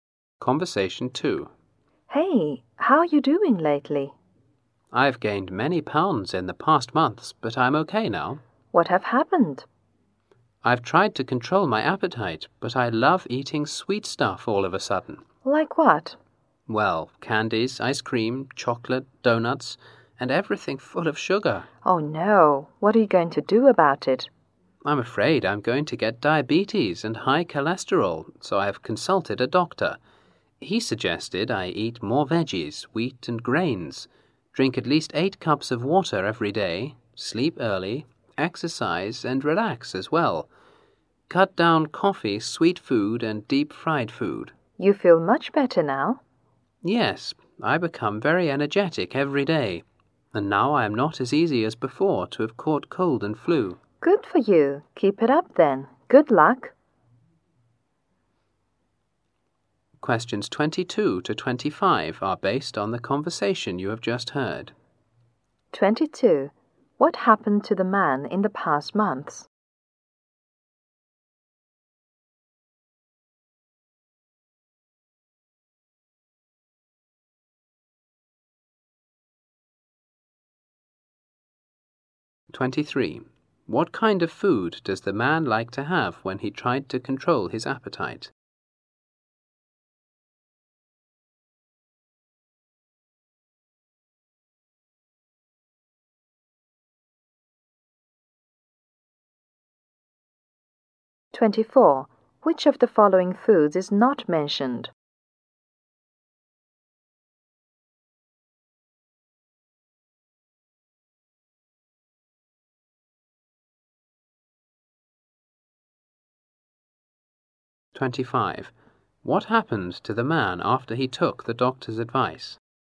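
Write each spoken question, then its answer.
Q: What happened to the man in the past months?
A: He gained many pounds

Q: What kind of food does the man like to have when he tried to control his appetite?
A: Sweet foods

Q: What happened to the man after he took the doctor's advice?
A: He became very energetic and catches colds and flu less easily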